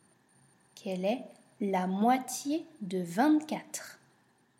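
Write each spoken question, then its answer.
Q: Quelle est la moitié de 24?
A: 12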